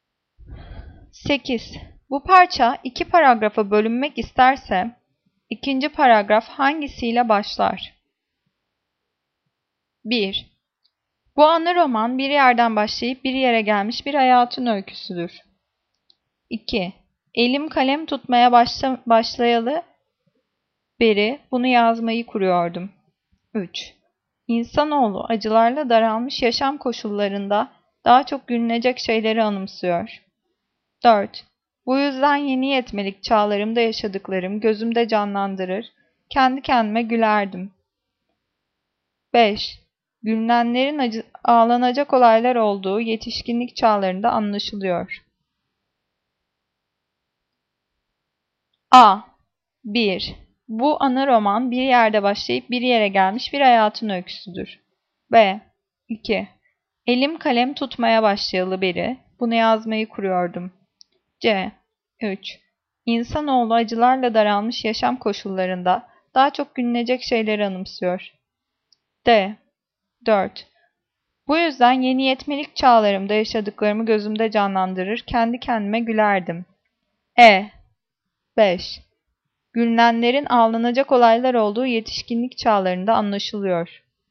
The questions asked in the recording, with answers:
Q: Bu parça iki paragrafa bölünmek isterse, ikinci paragraf hangisiyle başlar?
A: Cevap C. 3. İnsanoğlu acılarla daralmış yaşam koşullarında daha çok gülünecek şeyleri anımsıyor.